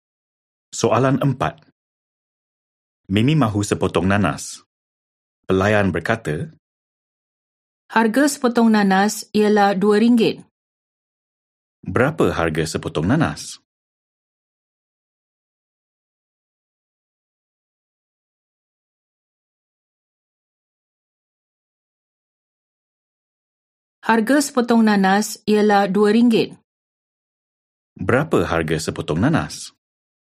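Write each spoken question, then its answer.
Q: Berapa harga sepotong nanas?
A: RM2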